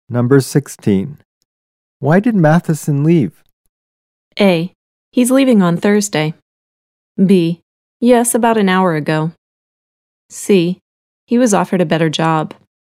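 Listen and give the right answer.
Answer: C: He was offered a better job.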